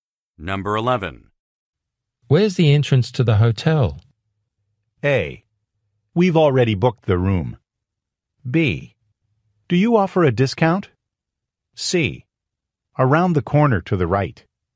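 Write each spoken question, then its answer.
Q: Where's the entrance to the hotel?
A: C: Around the corner to the right.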